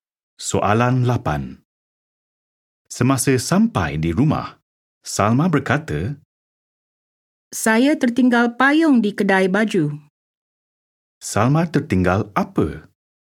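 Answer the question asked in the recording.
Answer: Payung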